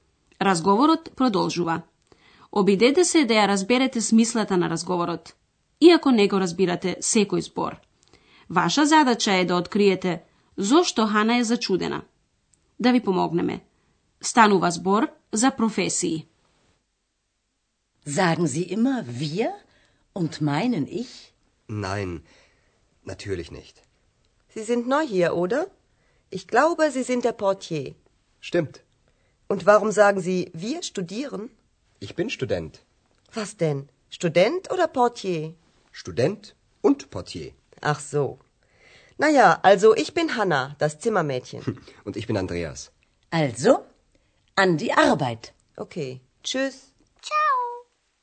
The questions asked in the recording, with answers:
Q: Ваша задача е да откриете зошто Хана е зачудена.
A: Хана е зачудена затоа што Андреас и вели дека е студент, иако и потврди дека е портир.